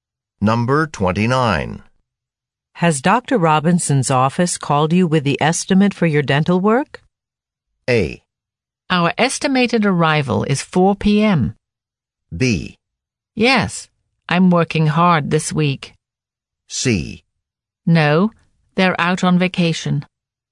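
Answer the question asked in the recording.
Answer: C: No, they're out on vacation.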